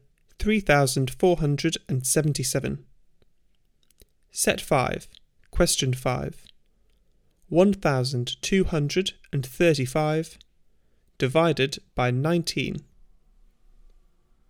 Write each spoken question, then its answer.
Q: 1235 divided by 19.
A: Answer 65.